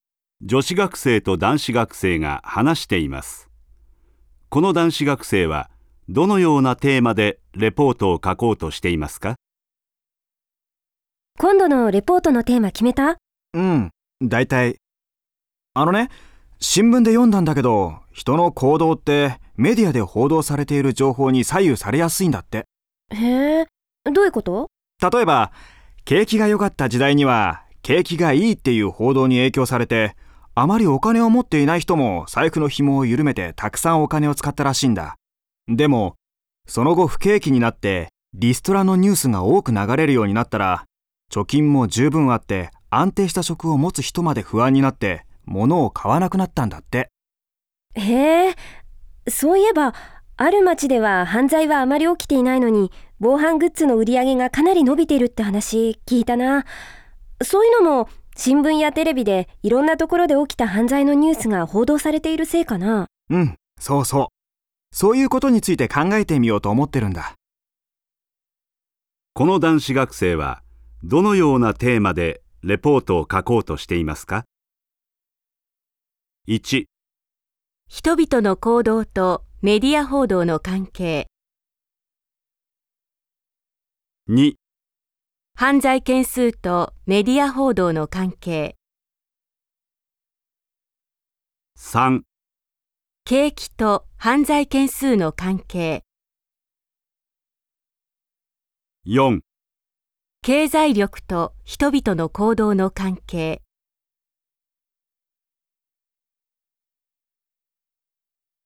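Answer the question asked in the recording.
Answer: 1: 人々の行動とメディア報道の関係。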